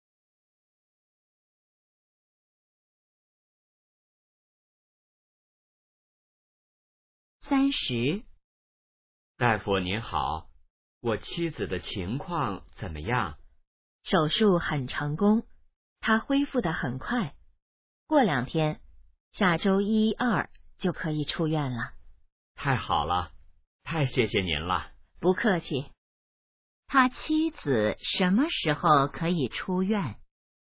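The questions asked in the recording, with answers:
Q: 他妻子什么时候可以出院?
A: 下周一或周二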